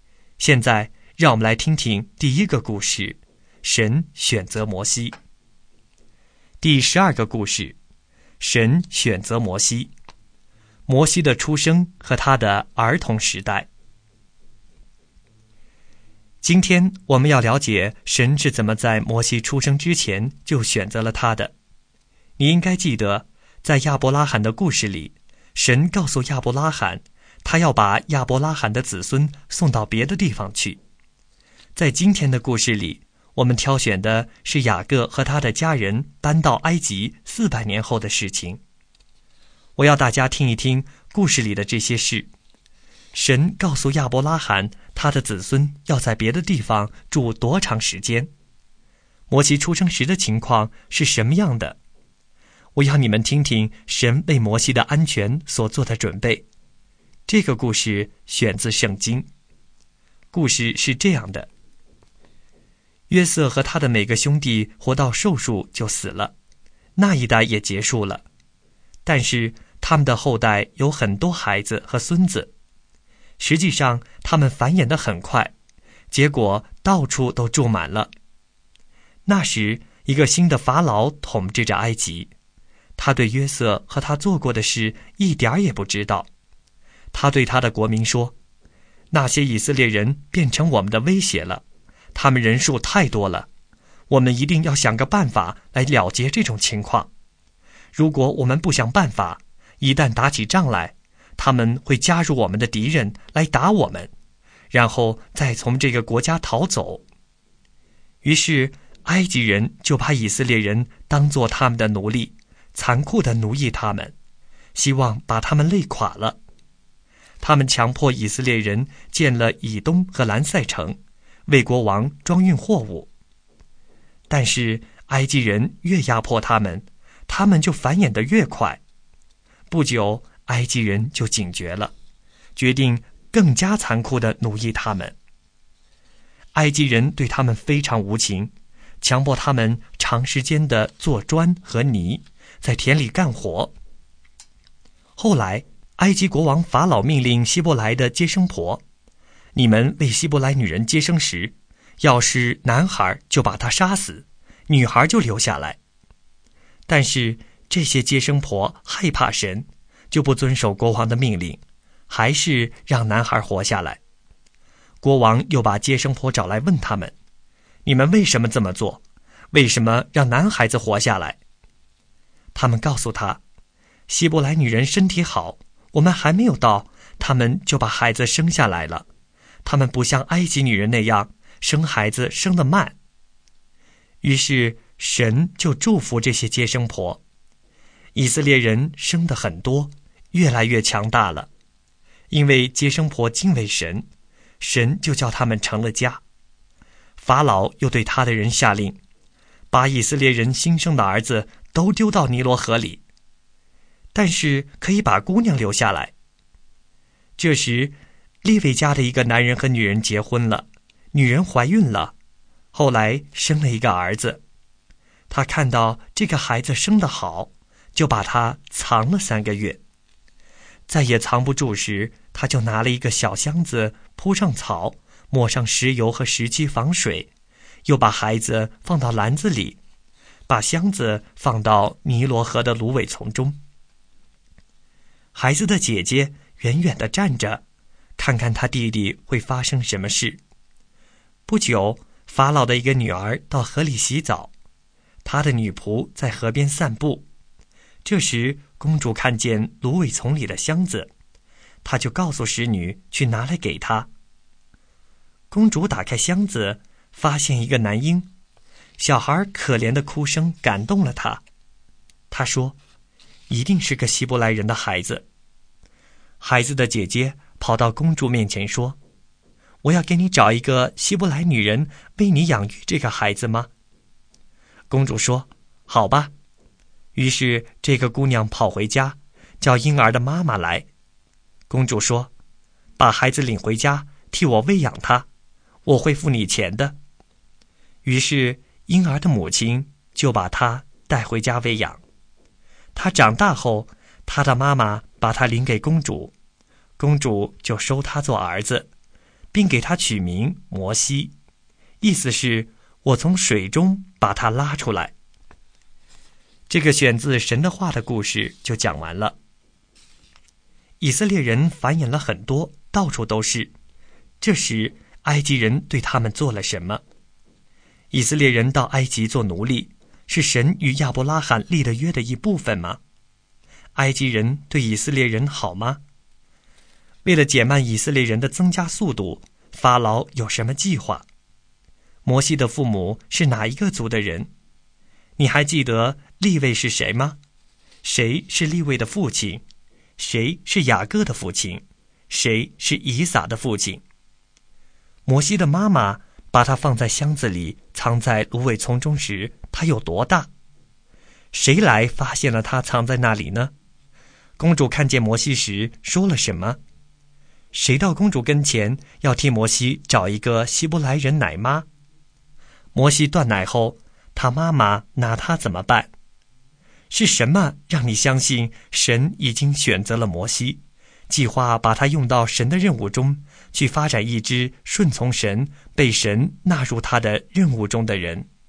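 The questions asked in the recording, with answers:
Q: 这时埃及人对他们做了什么?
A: 把以色列人当作奴隶,残酷地奴役他们

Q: 埃及人对以色列人好吗?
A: 不好,非常残酷无情

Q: 为了减慢以色列人的增加速度,法老有什么计划?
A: 让接生婆杀死男婴,后来下令把新生男孩丢到尼罗河里

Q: 摩西的父母是哪一个族的人?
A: 利未族

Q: 摩西的妈妈把他放在箱子里,藏在芦苇丛中时,他有多大?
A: 三个月

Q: 谁来发现了他藏在那里呢?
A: 法老的女儿(公主)

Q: 公主看见摩西时说了什么?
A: 一定是个希伯来人的孩子

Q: 谁到公主跟前要替摩西找一个希伯来人奶妈?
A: 摩西的姐姐

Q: 摩西断奶后,他妈妈拿他怎么办?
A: 把他领给公主,公主收他做儿子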